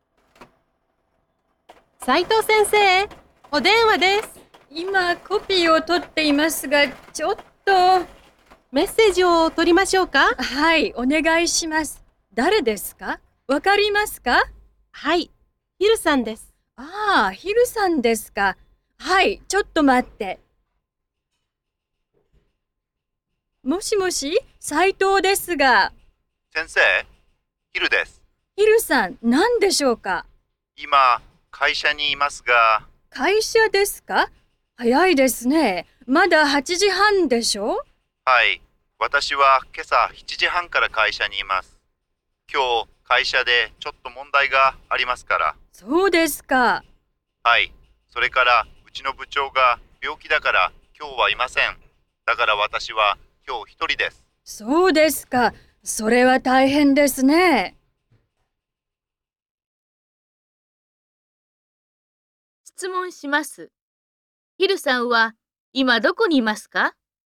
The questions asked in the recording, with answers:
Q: ヒルさんは今どこにいますか?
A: 会社にいます。